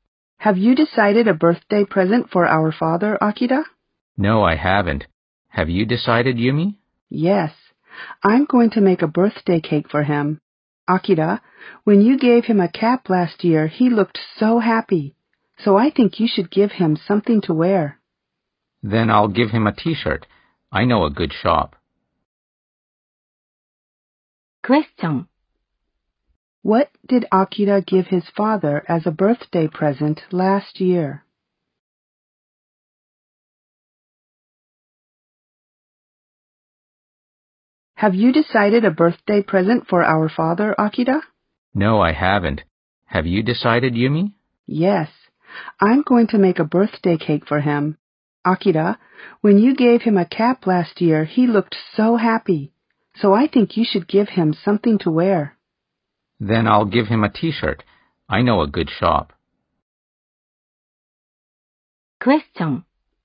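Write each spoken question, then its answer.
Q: What did Akira give his father as a birthday present last year?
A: A cap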